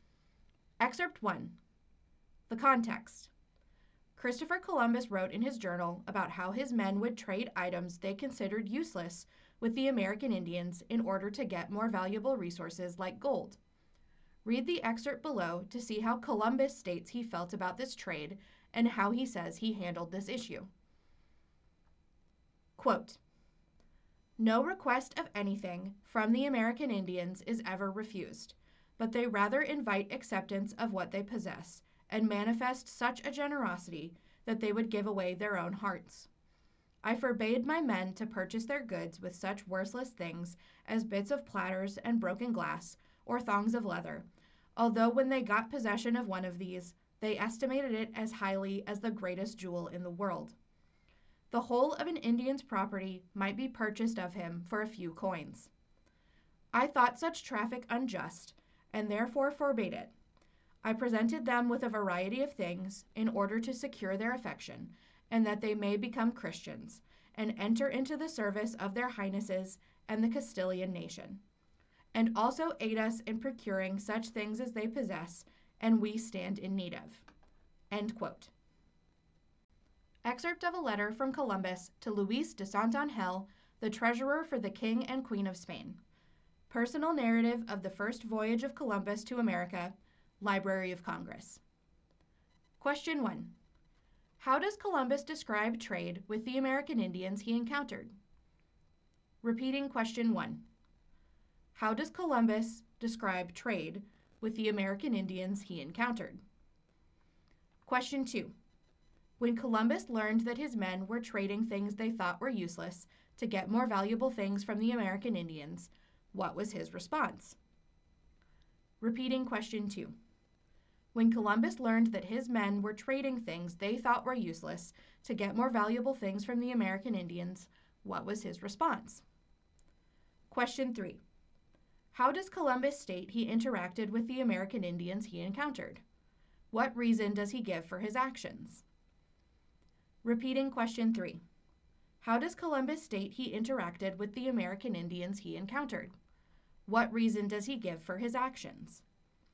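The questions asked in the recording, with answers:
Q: How does Columbus describe trade with the American Indians he encountered?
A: The American Indians were extremely generous: they never refused a request and would trade all their property for worthless items such as broken glass or a few coins.

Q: When Columbus learned that his men were trading things they thought were useless to get more valuable things from the American Indians, what was his response?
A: He thought the trade was unjust and forbade it.

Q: How does Columbus state he interacted with the American Indians he encountered? What reason does he give for his actions?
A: He gave them a variety of gifts to win their affection, so that they would become Christians, serve the Spanish crown and help the Spanish obtain the goods they needed.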